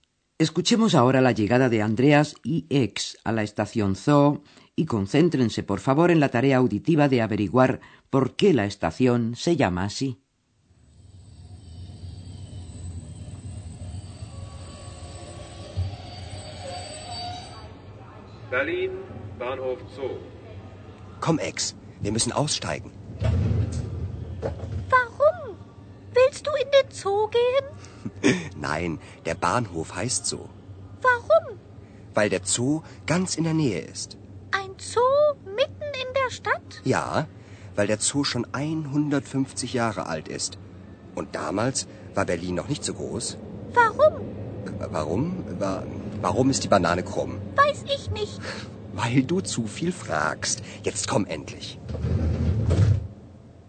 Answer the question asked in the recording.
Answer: La estación se llama Zoo Zoo en alemán porque se encuentra en las inmediaciones del Parque Zoológico de Berlín.